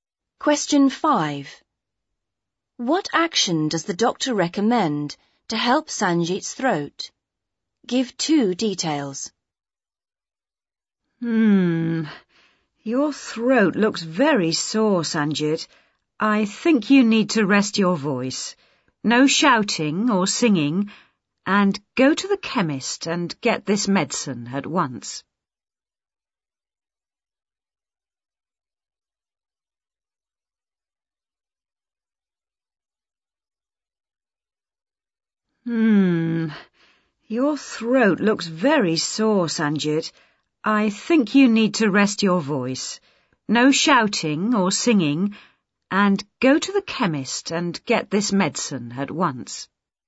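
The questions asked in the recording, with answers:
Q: What action does the doctor recommend to help Sanjit's throat?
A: Rest his voice (no shouting or singing) and get medicine from the chemist at once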